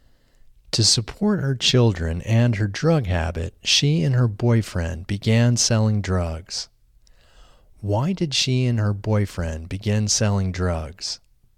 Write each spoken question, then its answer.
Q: Why did she and her boyfriend begin selling drugs?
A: She and her boyfriend began selling drugs to support her children and her drug habit.